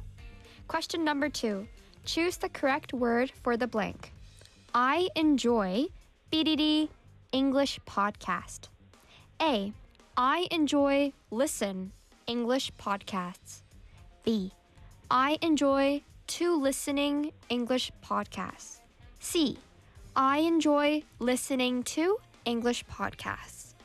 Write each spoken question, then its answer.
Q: Choose the correct word for the blank.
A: Listening to. Listening to라고 해야죠.